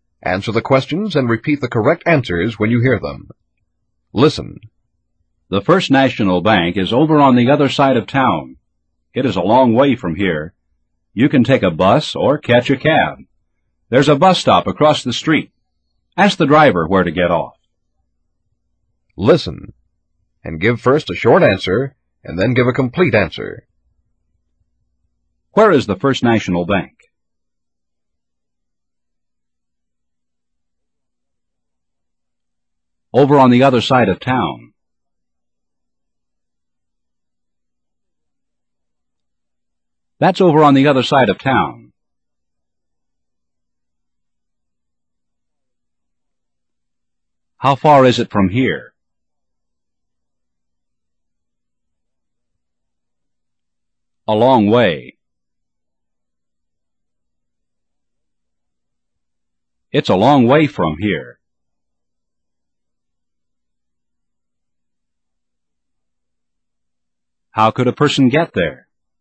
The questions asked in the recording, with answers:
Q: Where is the First National Bank?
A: Over on the other side of town.

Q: How far is it from here?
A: A long way.

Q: How could a person get there?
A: By bus or by cab?